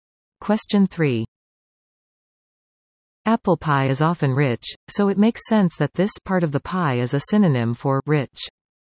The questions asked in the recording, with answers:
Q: Apple pie is often rich, so it makes sense that this part of the pie is a synonym for rich.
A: The upper crust.